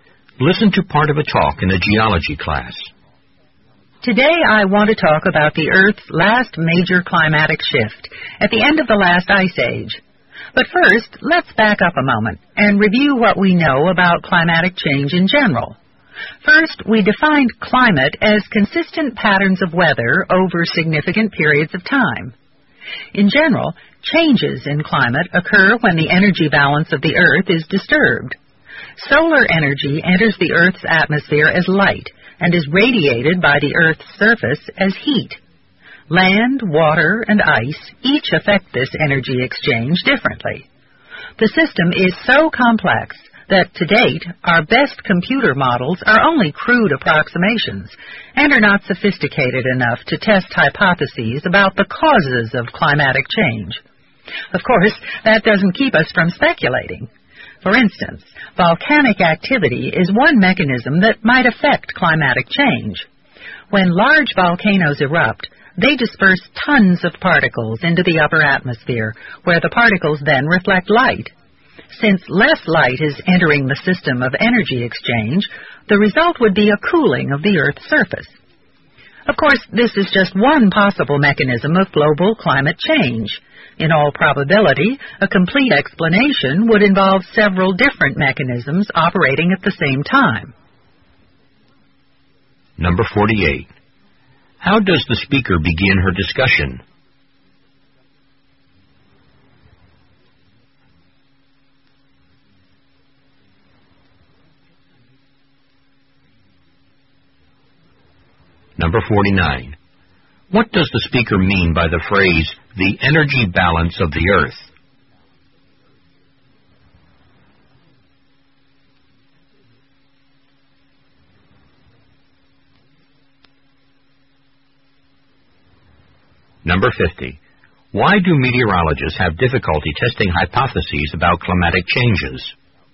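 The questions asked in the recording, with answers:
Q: How does the speaker begin her discussion?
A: By reviewing what is known about climatic change in general

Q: What does the speaker mean by the phrase, the energy balance of the Earth?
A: The exchange between solar energy entering as light and heat radiated by the Earth's surface

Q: Why do meteorologists have difficulty testing hypotheses about climatic changes?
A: The system is too complex; computer models are only crude approximations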